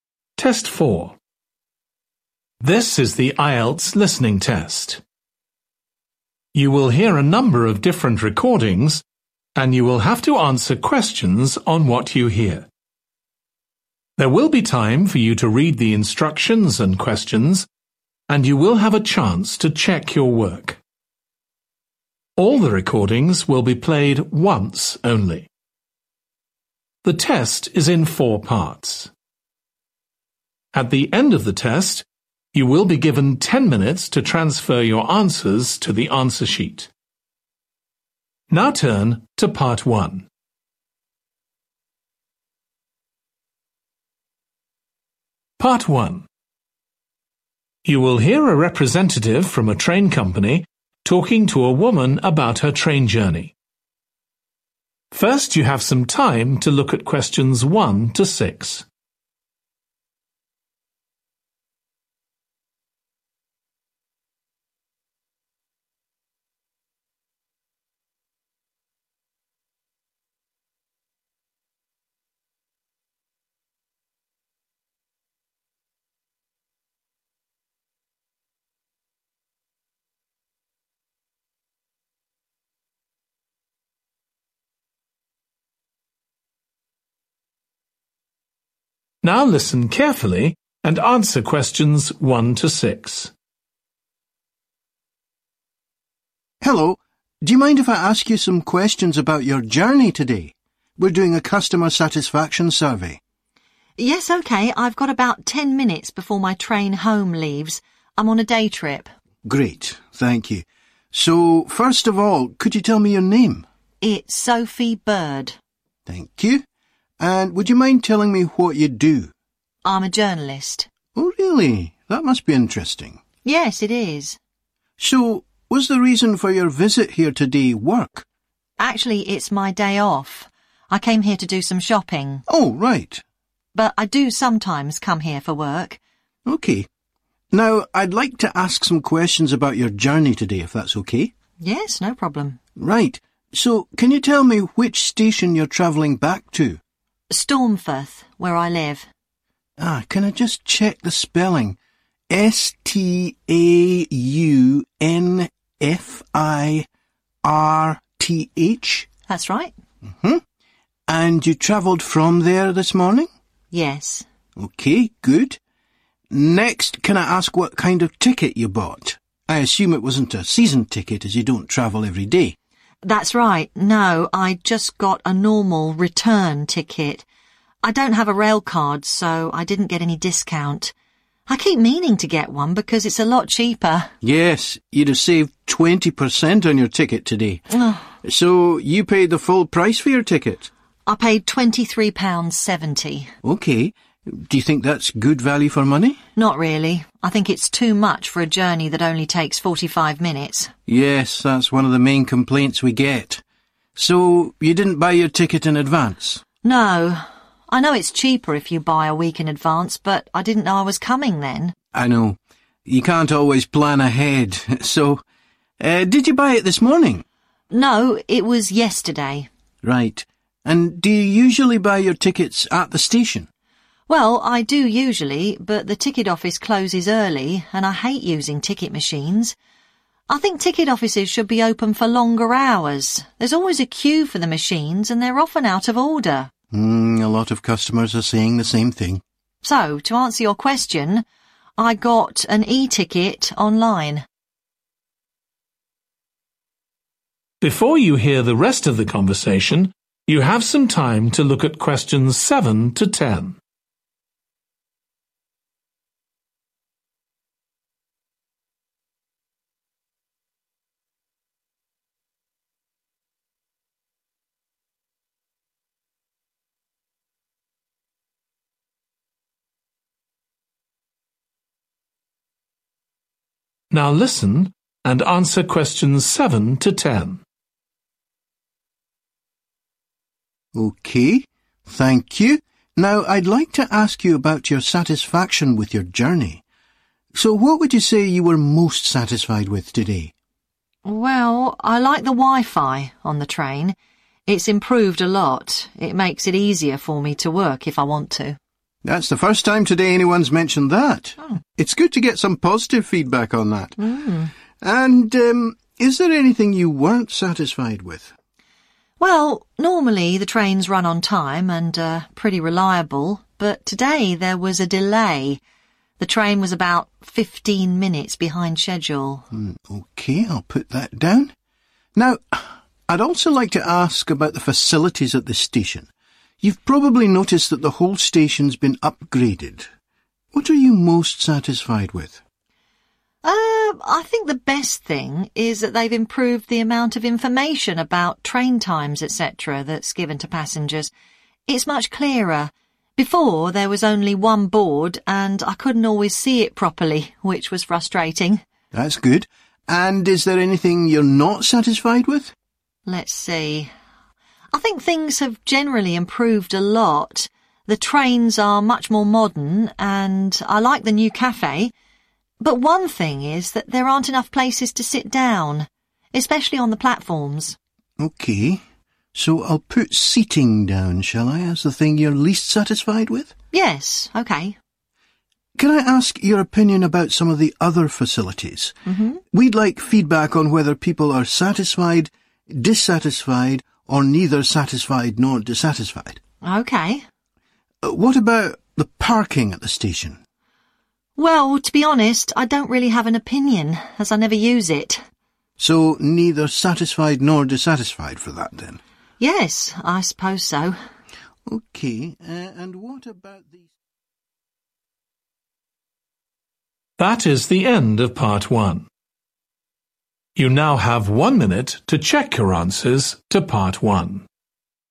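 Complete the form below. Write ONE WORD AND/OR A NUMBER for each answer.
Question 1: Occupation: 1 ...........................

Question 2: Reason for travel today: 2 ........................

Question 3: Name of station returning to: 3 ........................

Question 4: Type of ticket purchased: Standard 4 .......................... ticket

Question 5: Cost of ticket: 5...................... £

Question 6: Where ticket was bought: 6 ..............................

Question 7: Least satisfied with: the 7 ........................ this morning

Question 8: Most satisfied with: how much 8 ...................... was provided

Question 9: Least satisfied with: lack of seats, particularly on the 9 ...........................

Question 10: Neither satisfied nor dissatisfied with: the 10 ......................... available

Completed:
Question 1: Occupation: journalist
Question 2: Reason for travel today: shopping
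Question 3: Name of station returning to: Staunfirth
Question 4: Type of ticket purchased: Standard return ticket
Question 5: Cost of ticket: 23.70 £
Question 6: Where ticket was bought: online
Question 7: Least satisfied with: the delay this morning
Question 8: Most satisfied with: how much information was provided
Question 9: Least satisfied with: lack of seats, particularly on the platforms
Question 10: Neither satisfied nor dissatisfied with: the parking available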